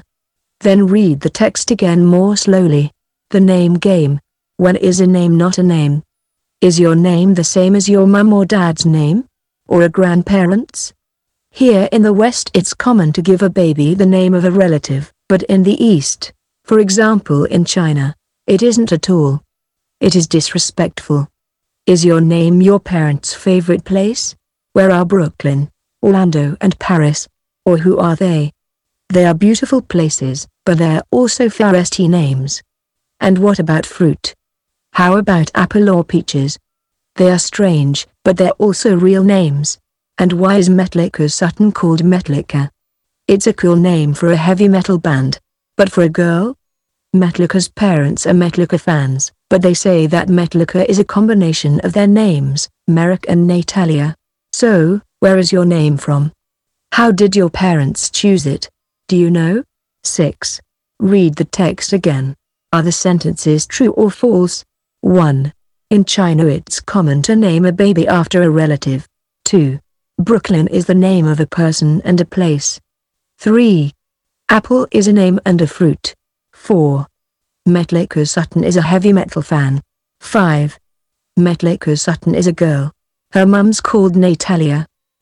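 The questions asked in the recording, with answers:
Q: In China it's common to name a baby after a relative.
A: False

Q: Brooklyn is the name of a person and a place.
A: True

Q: Apple is a name and a fruit.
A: True

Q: Metallica Sutton is a heavy metal fan.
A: False

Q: Metallica Sutton is a girl.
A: True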